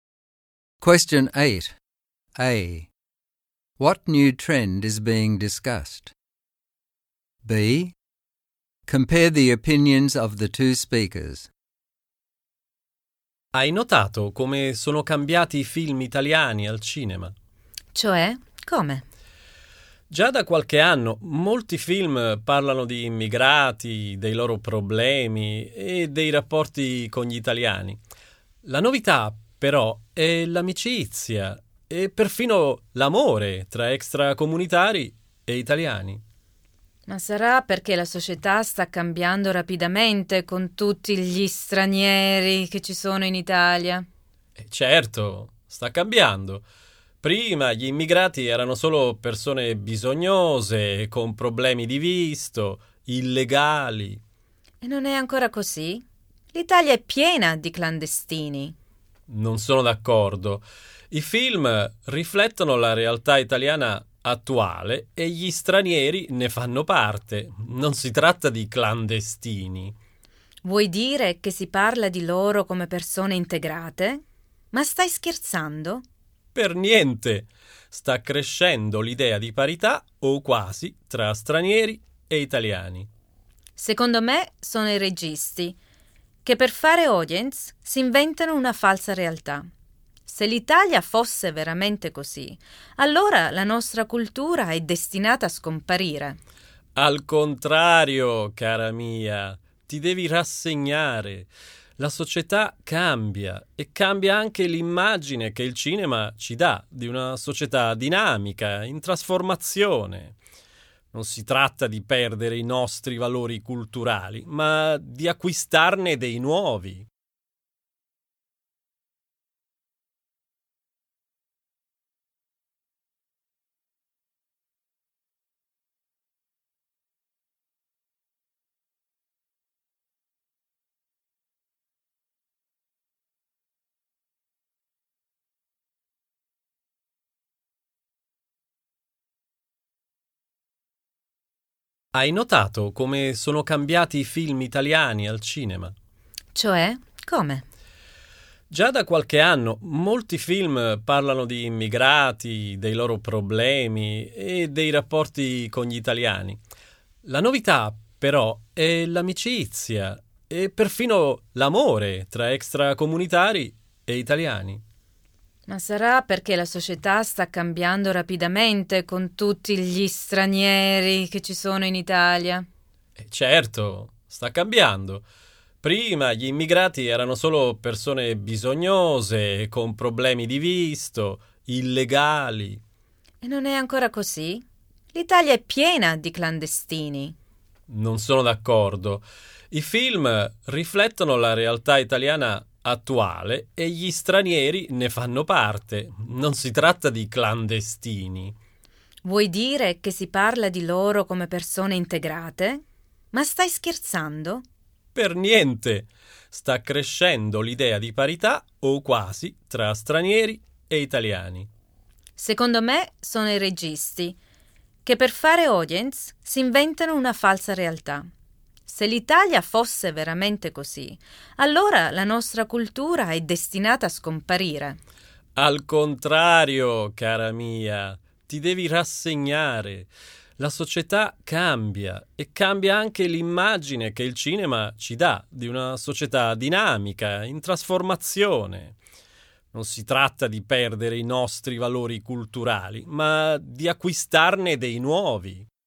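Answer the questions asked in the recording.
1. Italian films now show friendship and even love between immigrants and Italians.
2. The man thinks the films reflect a changing society that is integrating immigrants and gaining new values. The woman thinks directors invent a false reality for audiences and fears Italian culture will disappear.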